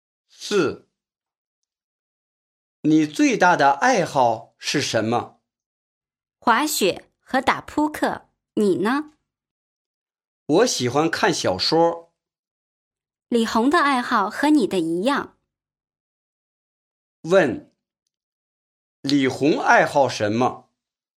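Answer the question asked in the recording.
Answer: 看小说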